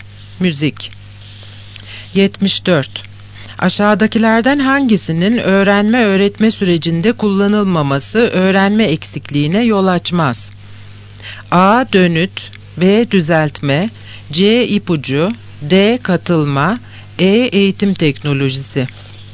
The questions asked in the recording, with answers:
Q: Aşağıdakilerden hangisinin öğrenme-öğretme sürecinde kullanılmaması öğrenme eksikliğine yol açmaz?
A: Yanıt E. Eğitim teknolojisi.